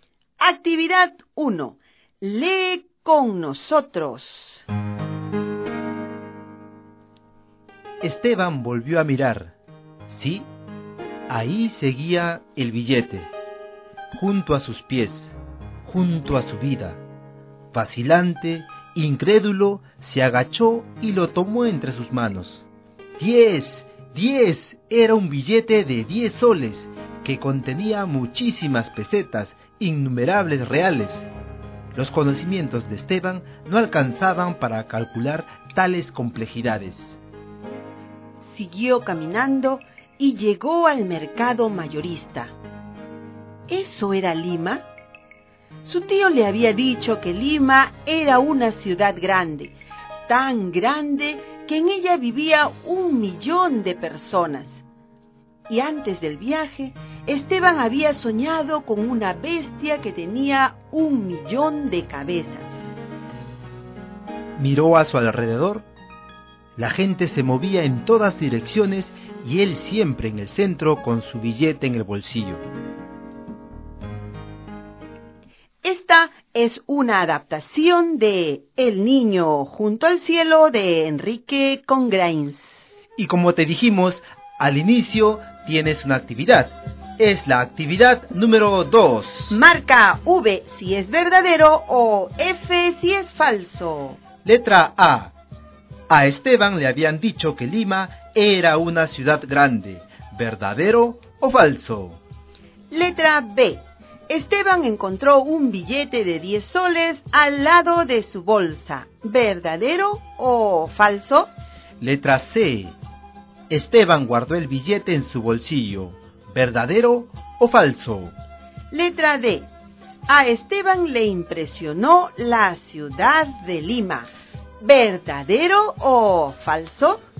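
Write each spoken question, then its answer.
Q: A Esteban le habían dicho que Lima era una ciudad grande.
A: Verdadero

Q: Esteban encontró un billete de 10 soles al lado de su bolsa.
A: Falso

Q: Esteban guardó el billete en su bolsillo.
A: Verdadero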